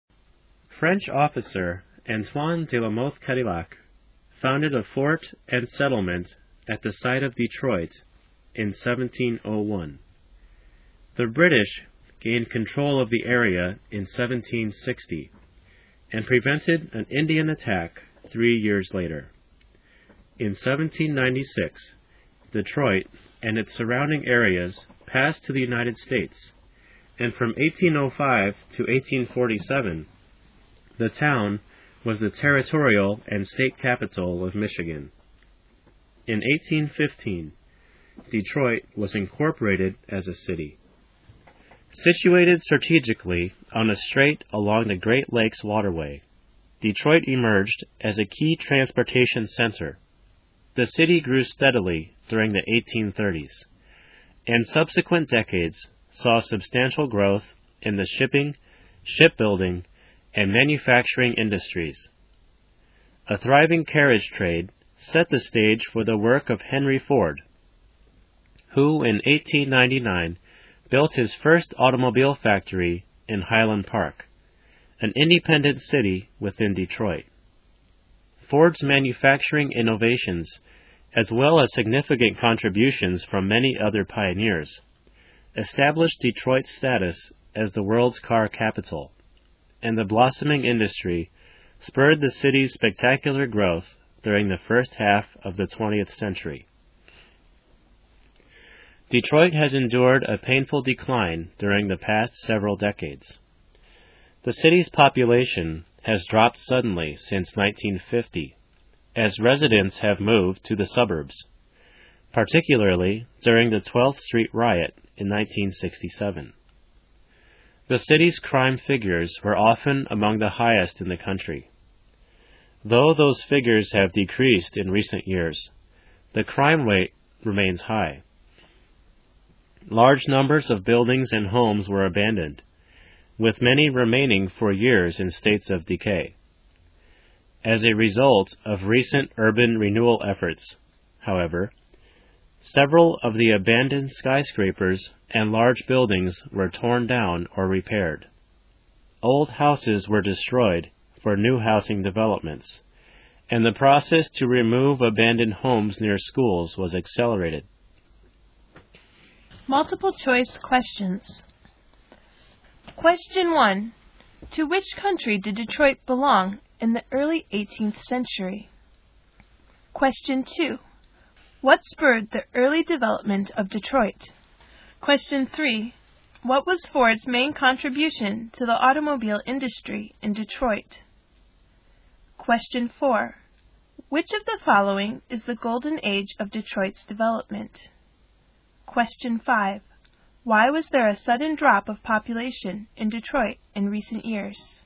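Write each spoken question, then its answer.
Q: To which country did Detroit belong in the early 18th century?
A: France

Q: What was Ford's main contribution to the automobile industry in Detroit?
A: His manufacturing innovations

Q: Why was there a sudden drop of population in Detroit in recent years?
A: Residents moved to the suburbs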